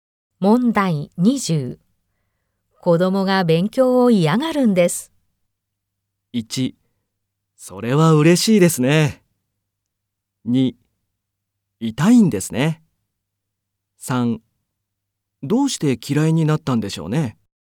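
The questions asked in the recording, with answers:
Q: 子供が勉強を嫌がるんです。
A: 1: どうして嫌いになったんでしょうね。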